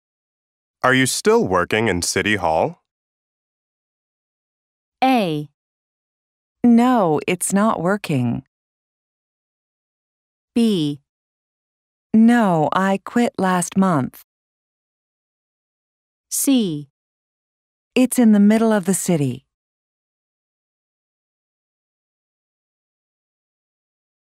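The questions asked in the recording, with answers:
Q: Are you still working in City Hall?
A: B: No, I quit last month.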